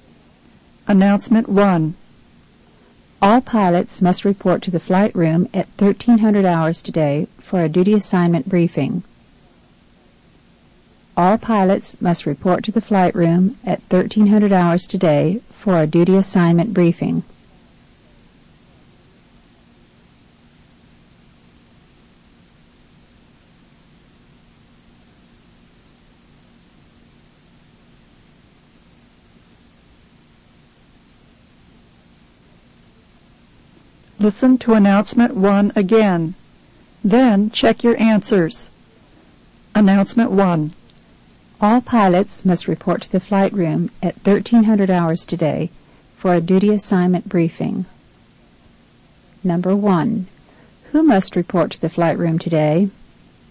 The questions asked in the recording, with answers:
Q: Who must report to the flight room today?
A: The answer is letter B. All pilots.